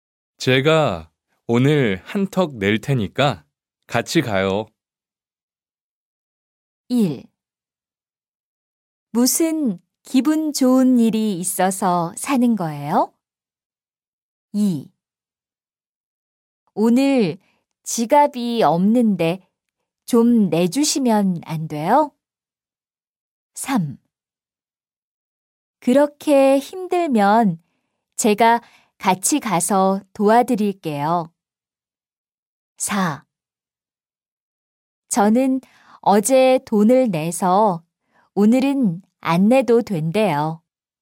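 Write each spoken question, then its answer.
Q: 제가 오늘 한턱 낼 테니까 같이 가요.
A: 1: 무슨 기분 좋은 일이 있어서 사는 거예요?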